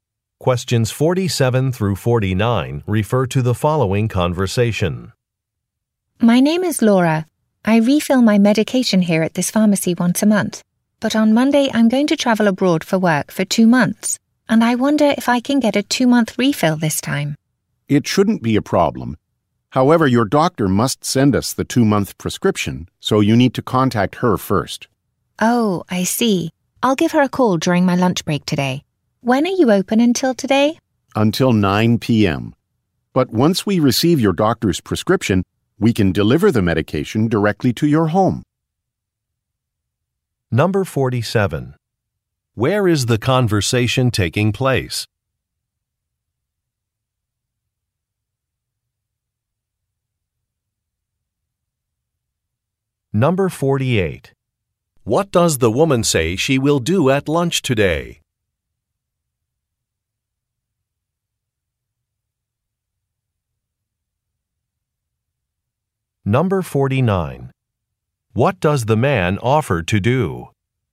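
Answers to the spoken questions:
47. At a pharmacy
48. Call her doctor
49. Deliver the medication to her home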